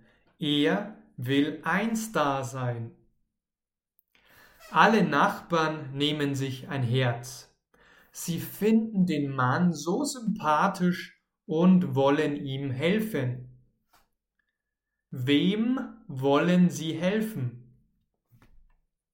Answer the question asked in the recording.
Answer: Dem Mann. Sie wollen dem Mann helfen.